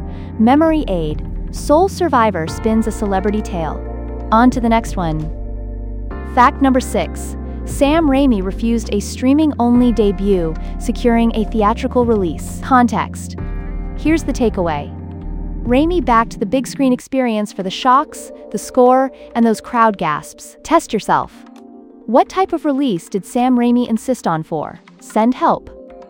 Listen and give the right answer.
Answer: A theatrical release.